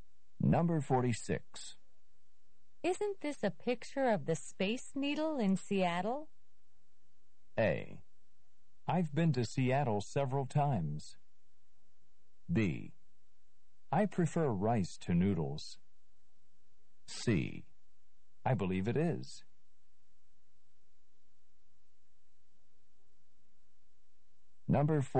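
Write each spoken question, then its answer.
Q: Isn't this a picture of the Space Needle in Seattle?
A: C: I believe it is.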